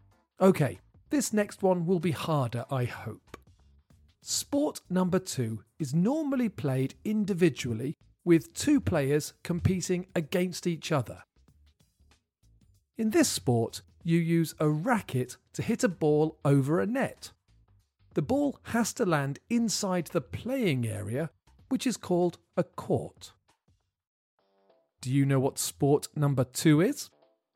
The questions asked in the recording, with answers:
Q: Do you know what sport number two is?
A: The answer is tennis.